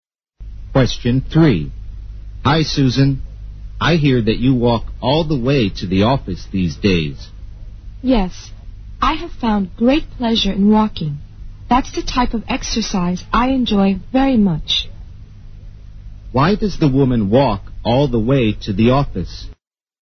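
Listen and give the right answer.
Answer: She enjoys walking as exercise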